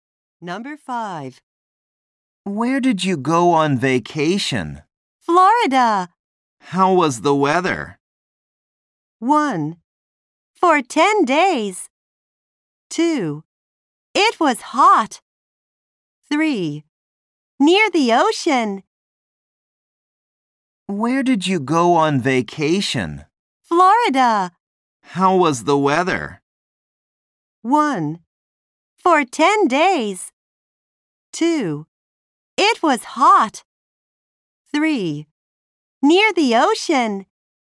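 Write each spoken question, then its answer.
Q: How was the weather?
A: 2: It was hot.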